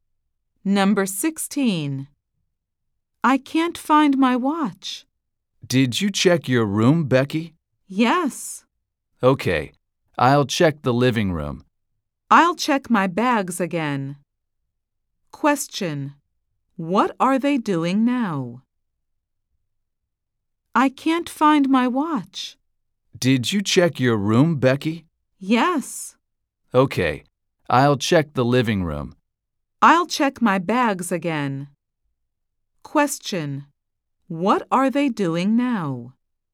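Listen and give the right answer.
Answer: Looking for Becky's watch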